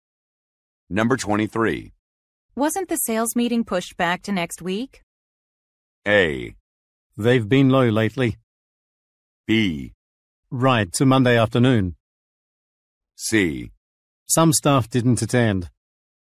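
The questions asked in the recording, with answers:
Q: Wasn't the sales meeting pushed back to next week?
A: B: Right, to Monday afternoon.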